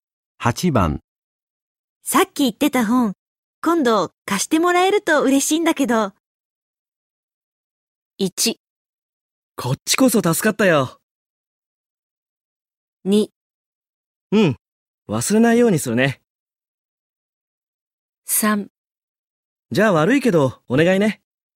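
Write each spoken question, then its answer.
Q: さっき言ってた本、今度貸してもらえると嬉しいんだけど。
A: 2: うん、忘れないようにするね。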